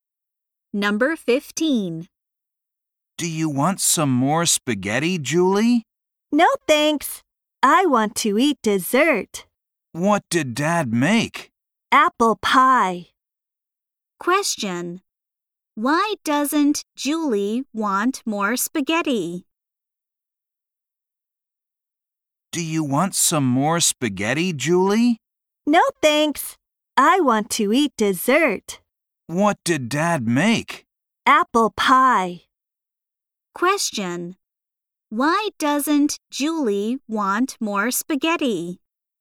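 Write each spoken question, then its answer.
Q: Why doesn't Julie want more spaghetti?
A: She wants to eat dessert.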